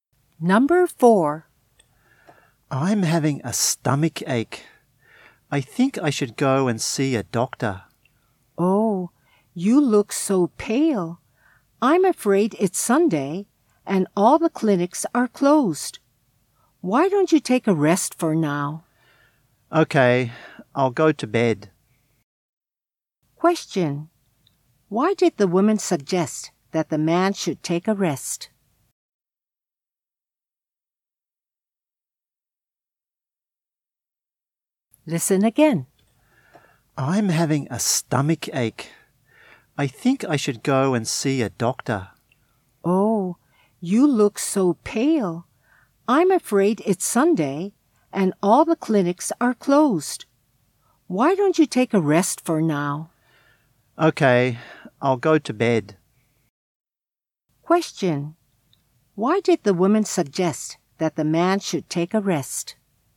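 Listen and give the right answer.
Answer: Because it's Sunday and all the clinics are closed.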